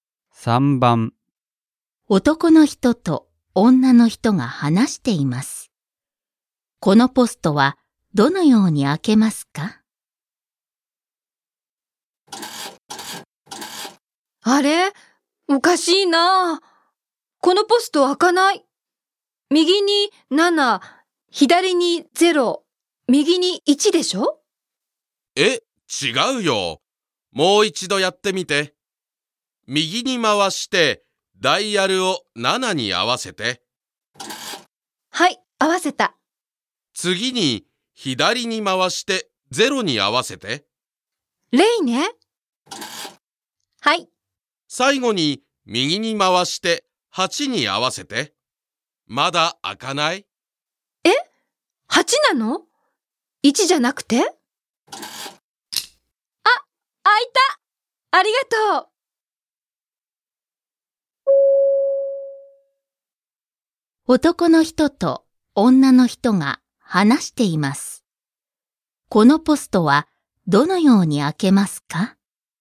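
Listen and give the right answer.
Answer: 右に回して7、左に回して0、右に回して8に合わせる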